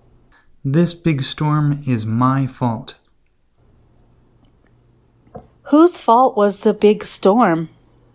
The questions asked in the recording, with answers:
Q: Whose fault was the big storm?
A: The big storm was Jonah's fault.